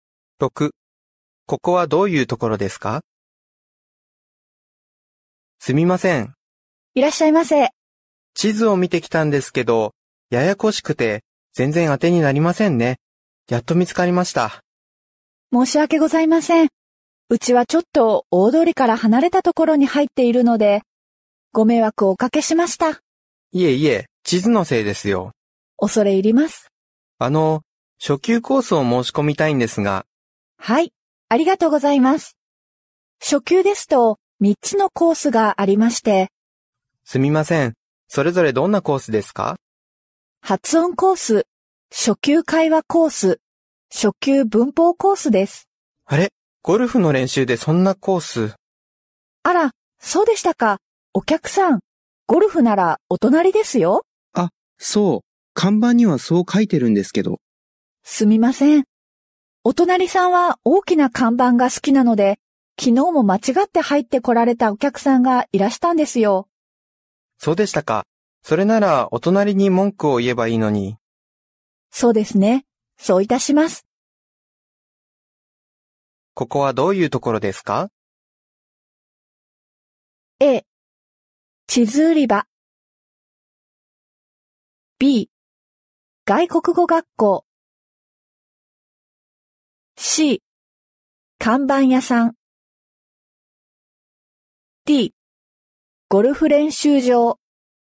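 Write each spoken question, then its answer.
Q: ここはどういうところですか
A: B: 外国語学校。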